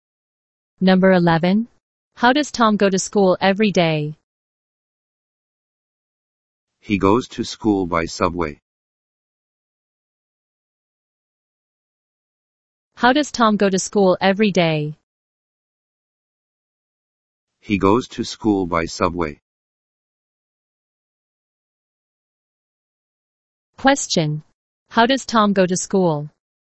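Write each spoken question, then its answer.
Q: Question. How does Tom go to school?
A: By subway.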